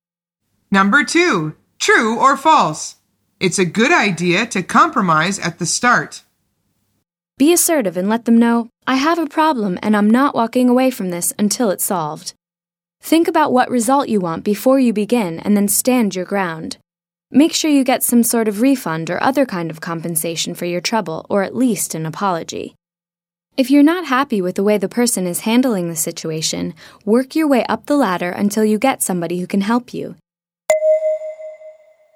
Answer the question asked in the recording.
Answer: The answer is false.